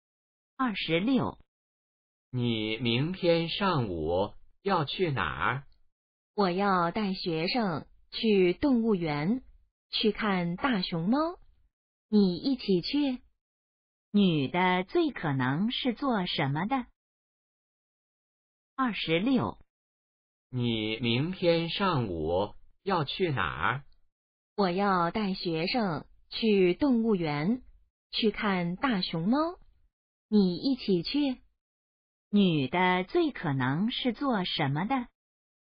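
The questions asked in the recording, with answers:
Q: 女的最可能是做什么的?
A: 老师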